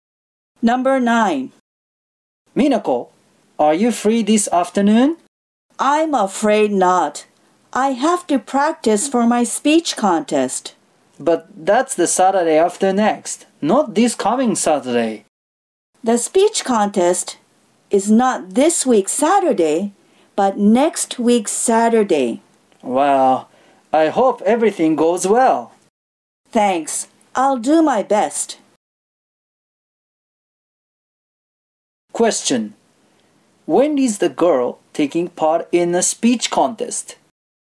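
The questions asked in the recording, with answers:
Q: Question. When is the girl taking part in a speech contest?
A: On the Saturday after next (next week's Saturday)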